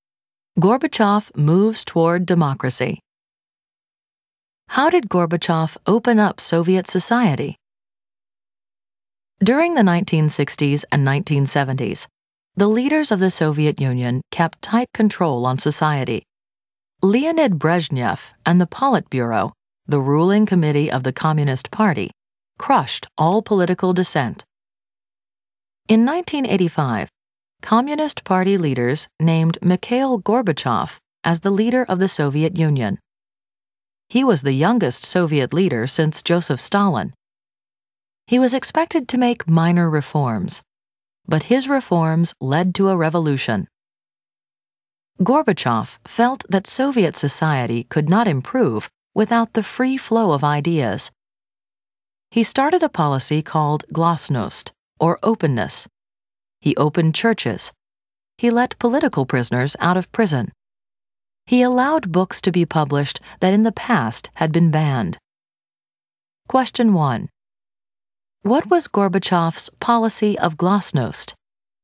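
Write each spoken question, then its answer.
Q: What was Gorbachev's policy of glasnost?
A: A policy of openness: churches opened, political prisoners released, banned books published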